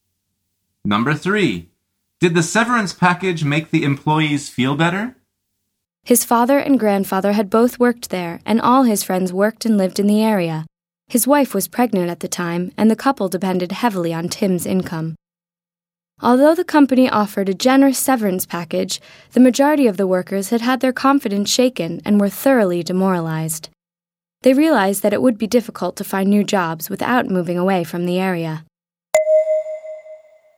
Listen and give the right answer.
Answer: The answer is no.